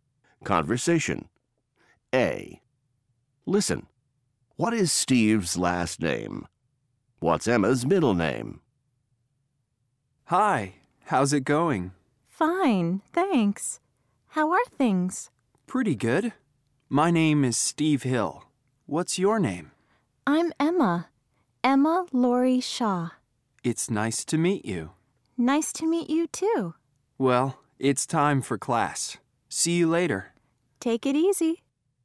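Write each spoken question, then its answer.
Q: What is Steve's last name?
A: Hill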